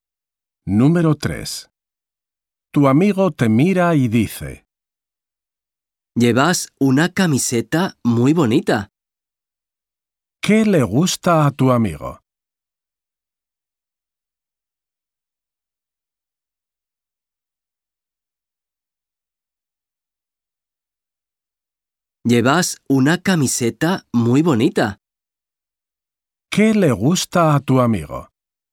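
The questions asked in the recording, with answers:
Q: ¿Qué le gusta a tu amigo?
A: Tu camiseta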